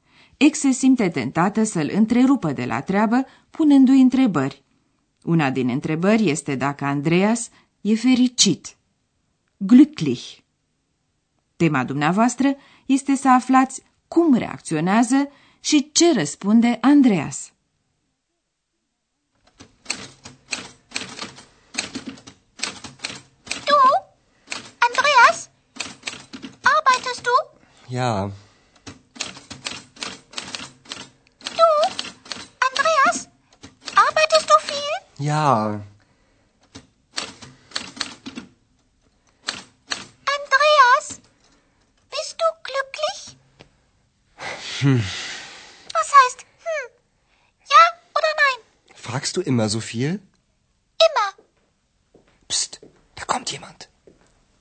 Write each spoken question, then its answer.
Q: Tema dumneavoastră este să aflați cum reacționează și ce răspunde Andreas.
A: La întrebarea dacă e fericit, Andreas mormăie ceva nehotărât și răspunde apoi tot printr-o întrebare, și anume dacă ea întreabă totdeauna atât de multe.